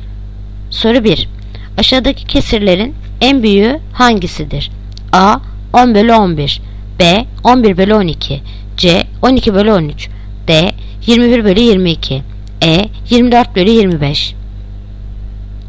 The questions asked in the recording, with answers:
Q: Aşağıdaki kesirlerin en büyüğü hangisidir?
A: Yanıt Edirne. 24/25.